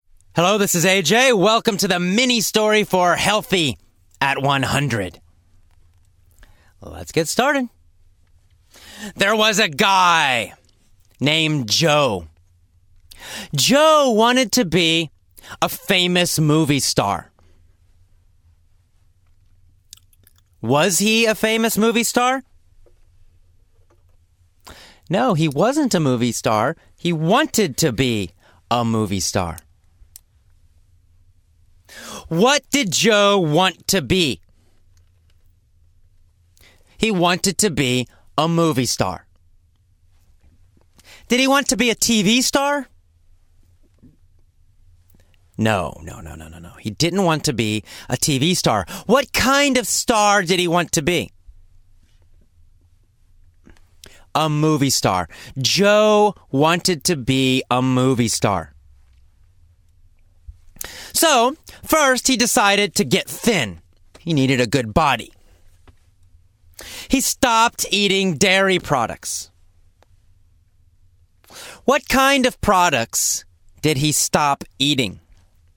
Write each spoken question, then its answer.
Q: What kind of products did he stop eating?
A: Well, dairy products. He stopped eating dairy products.